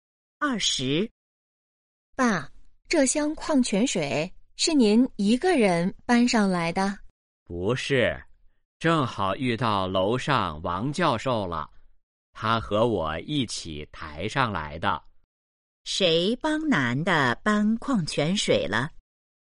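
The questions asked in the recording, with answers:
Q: 谁帮男的搬矿泉水了?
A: 王教授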